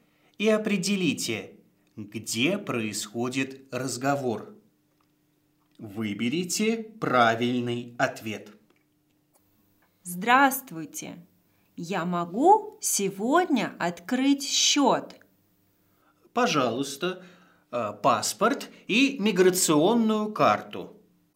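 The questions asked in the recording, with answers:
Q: Прослушайте диалог и определите, где происходит разговор.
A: в банке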